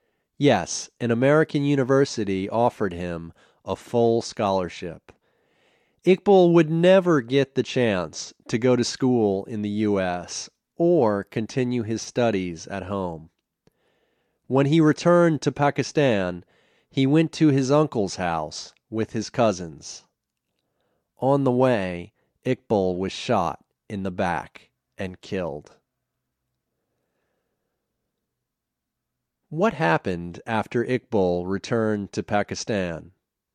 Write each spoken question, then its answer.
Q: What happened after Iqbal returned to Pakistan?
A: He was shot and killed.